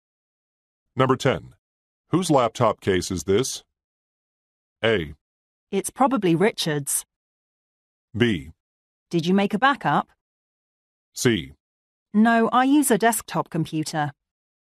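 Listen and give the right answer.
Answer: A: It's probably Richard's.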